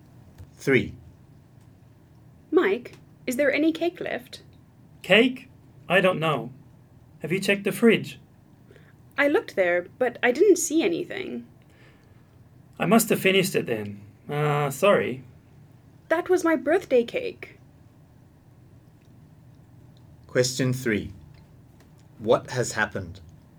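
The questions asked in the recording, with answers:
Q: What has happened?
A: Mike ate Jane's birthday cake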